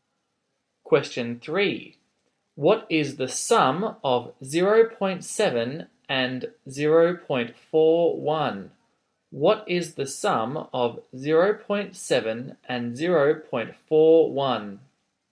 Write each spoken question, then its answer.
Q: What is the sum of 0.7 and 0.41?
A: your answer is 1.11.